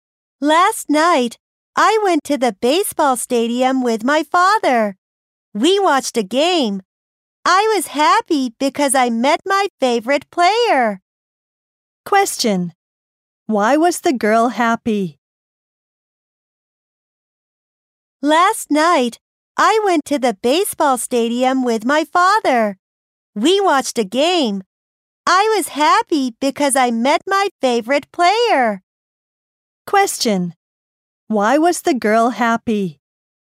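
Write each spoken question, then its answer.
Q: Why was the girl happy?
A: She met her favorite player.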